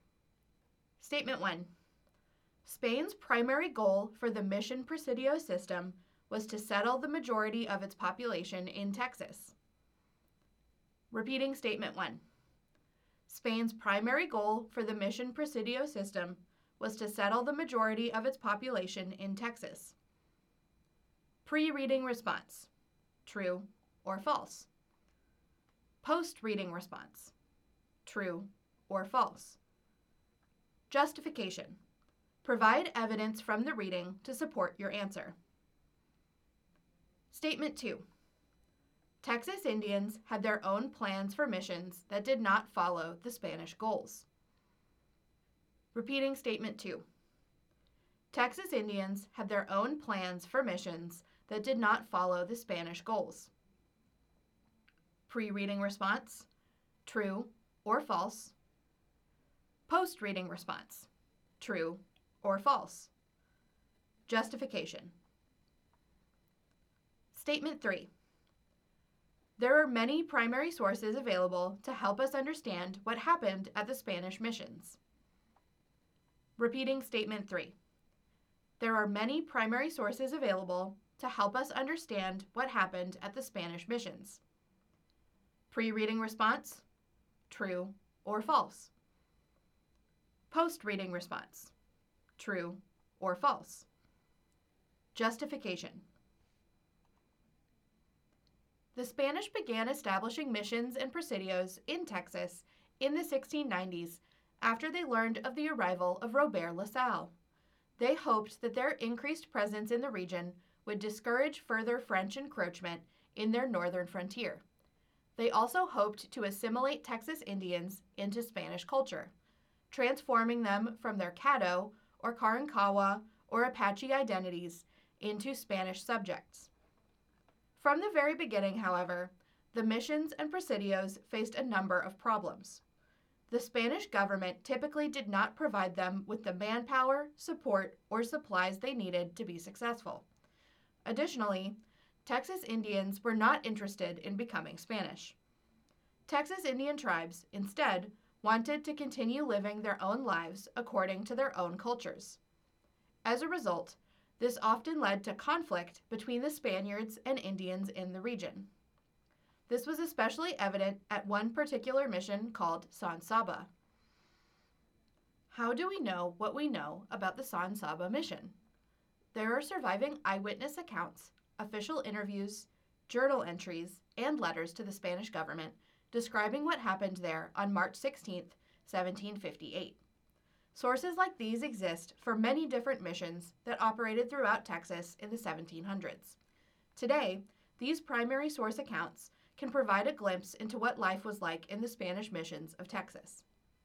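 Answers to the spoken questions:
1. False
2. True
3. True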